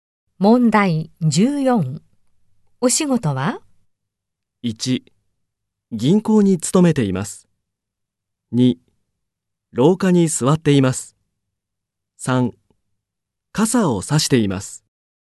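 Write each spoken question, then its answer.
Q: お仕事は?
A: 2: 銀行に勤めています。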